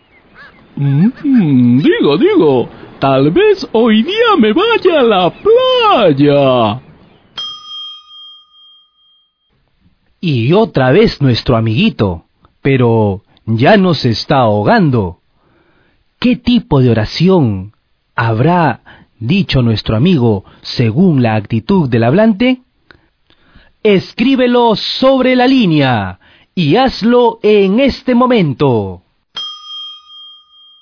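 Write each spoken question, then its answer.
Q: ¿Qué tipo de oración habrá dicho nuestro amigo según la actitud del hablante?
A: Oración dubitativa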